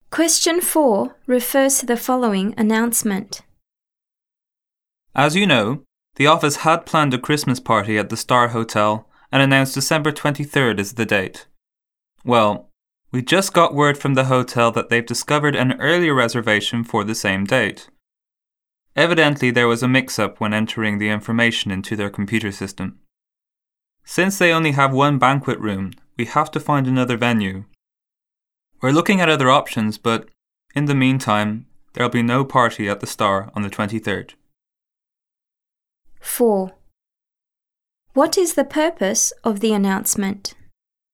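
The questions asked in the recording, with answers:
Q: What is the purpose of the announcement?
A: To announce that the Christmas party can no longer be held at the Star Hotel on the 23rd and a new venue is needed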